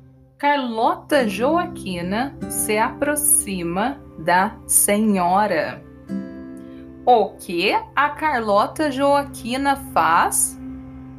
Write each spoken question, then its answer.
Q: o que a Carlota Joaquina faz?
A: Se aproxima da senhora. A Carlota Joaquina se aproxima da senhora.